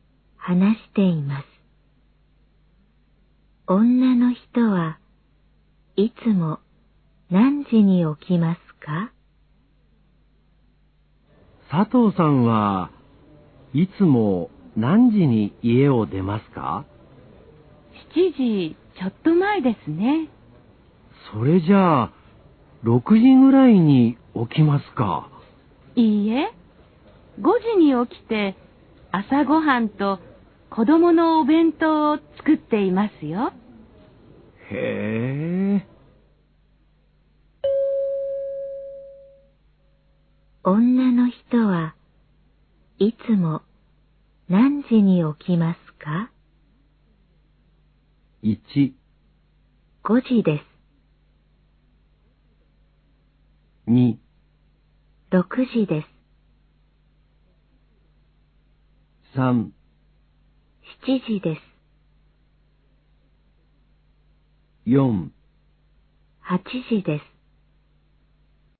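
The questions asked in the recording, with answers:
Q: 女の人はいつも何時に起きますか?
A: 1: 5時です。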